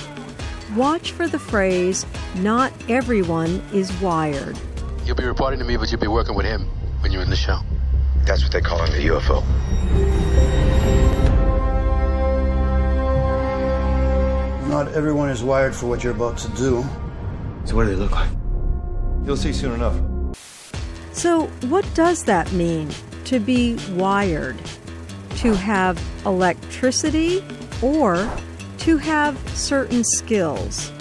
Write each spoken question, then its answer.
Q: So what does that mean to be wired?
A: not everyone is wired means the woman has skills that other people do not have.